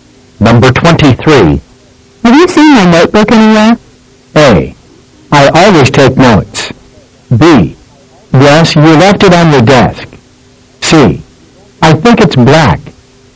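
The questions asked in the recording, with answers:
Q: Have you seen my notebook anywhere?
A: B: Yes, you left it on the desk.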